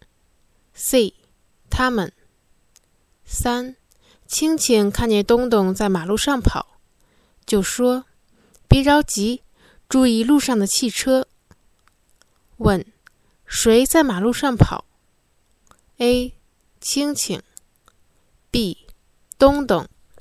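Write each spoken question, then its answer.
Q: 谁在马路上跑?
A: B: 东东。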